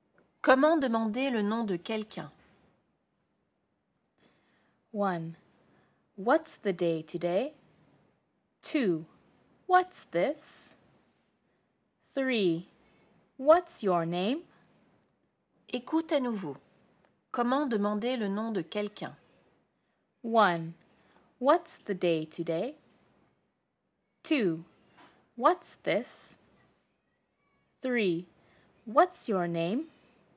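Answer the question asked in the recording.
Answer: 3: What's your name?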